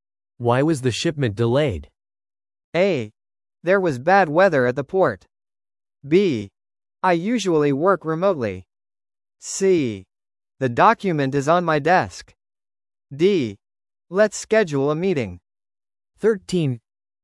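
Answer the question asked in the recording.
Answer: A: There was bad weather at the port.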